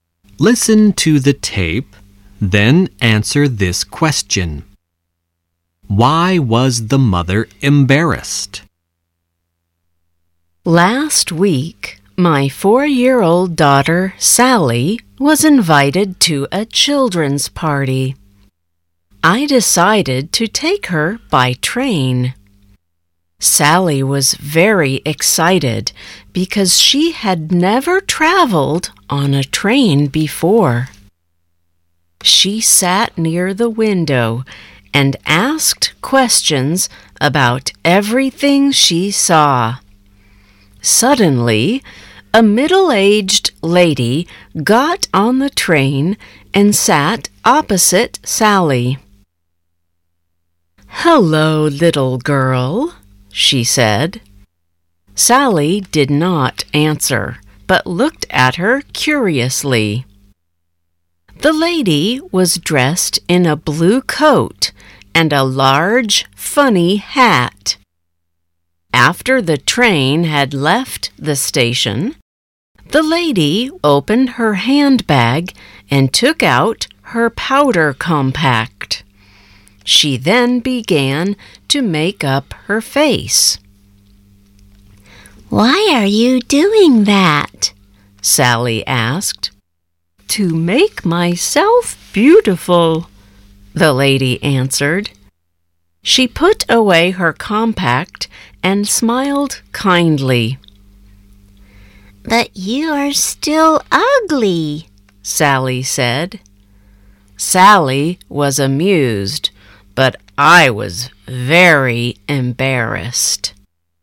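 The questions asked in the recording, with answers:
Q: Why was the mother embarrassed?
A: Because Sally told the lady she was still ugly.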